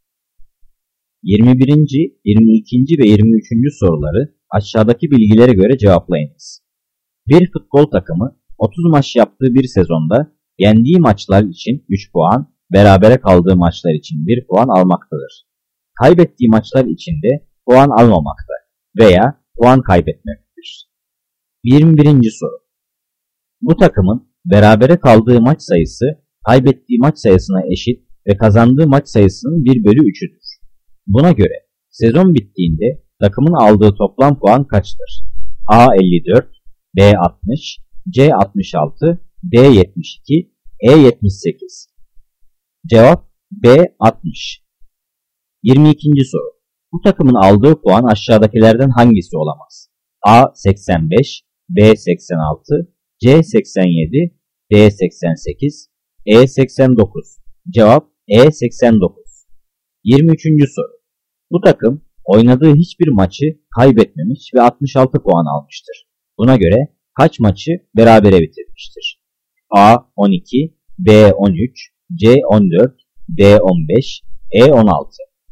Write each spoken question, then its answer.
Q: Buna göre sezon bittiğinde takımın aldığı toplam puan kaçtır?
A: Cevap B 60.

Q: Bu takımın aldığı puan aşağıdakilerden hangisi olamaz?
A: Cevap E 89.